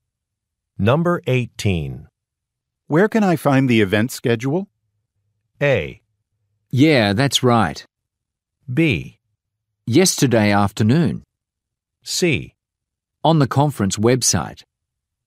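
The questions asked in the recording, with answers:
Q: Where can I find the event schedule?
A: C: On the conference website.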